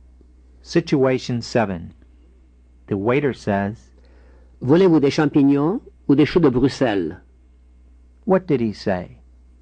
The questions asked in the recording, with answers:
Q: What did he say?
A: Do you want mushrooms or Brussels sprouts?